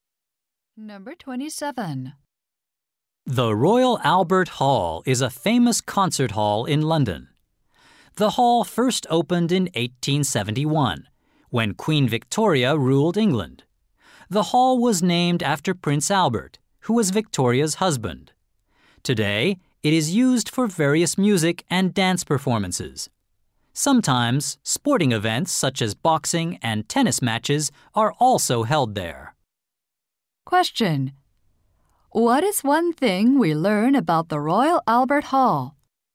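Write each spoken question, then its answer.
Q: What is one thing we learn about the Royal Albert Hall?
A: It was named after Queen Victoria's husband.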